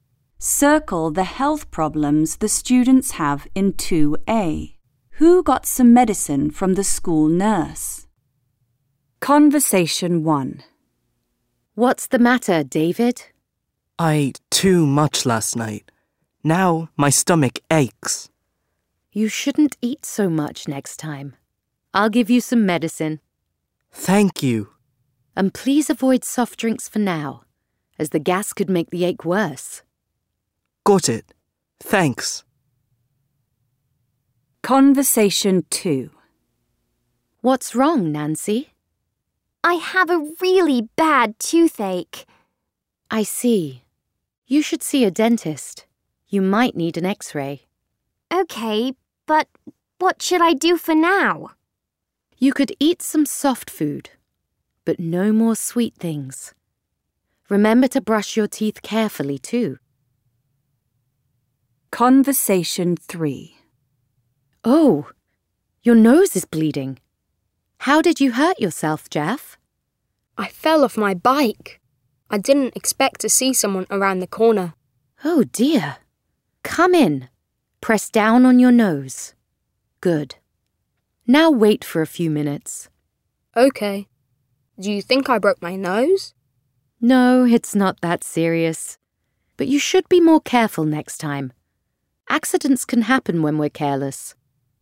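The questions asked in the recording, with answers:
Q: Who got some medicine from the school nurse?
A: David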